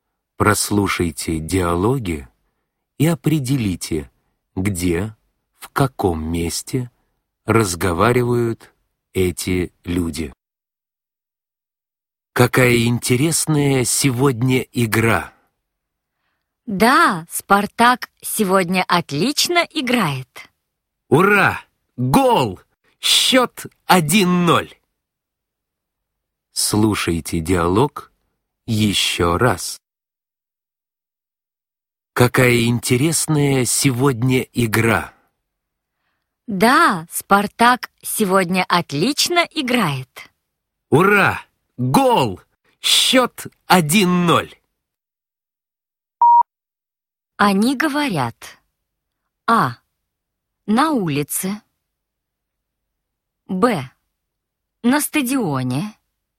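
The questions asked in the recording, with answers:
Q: Они говорят:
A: Б: На стадионе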